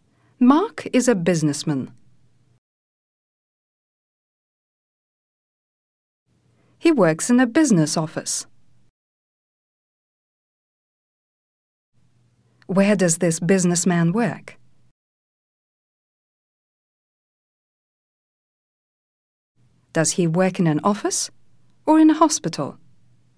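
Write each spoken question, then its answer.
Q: Where does this businessman work?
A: In a business office

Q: Does he work in an office or in a hospital?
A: In an office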